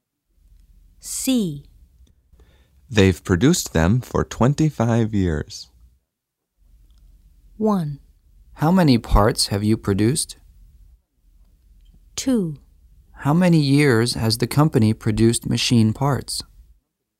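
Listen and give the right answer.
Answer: 2: How many years has the company produced machine parts?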